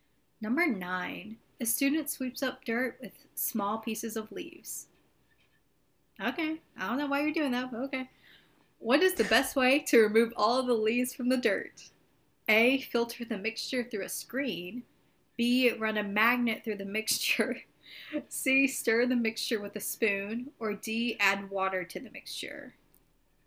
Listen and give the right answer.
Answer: It's the screen.